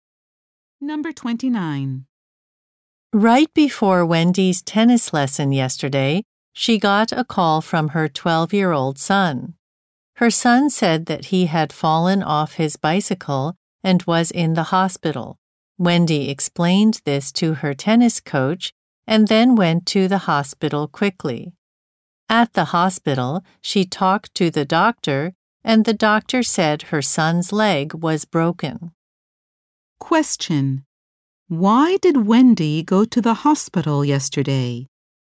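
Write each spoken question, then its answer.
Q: Why did Wendy go to the hospital yesterday?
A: Her son fell off his bicycle and broke his leg.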